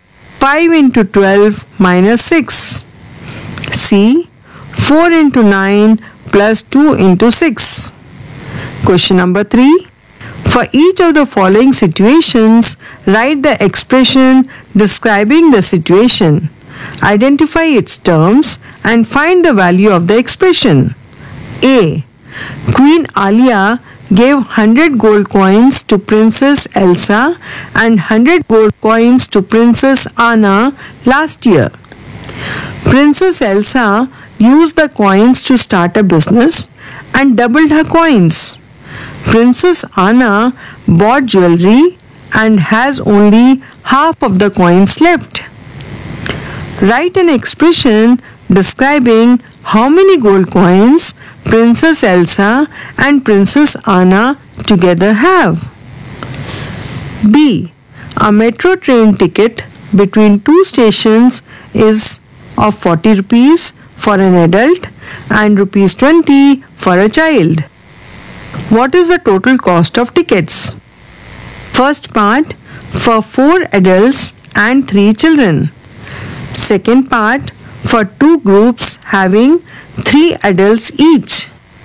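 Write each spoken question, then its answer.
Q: Write an expression describing how many gold coins Princess Elsa and Princess Anna together have.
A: 2 × 100 + 100 ÷ 2 = 250 gold coins

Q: Second part, for 2 groups having 3 adults each.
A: 2 × (3 × 40) = 240 rupees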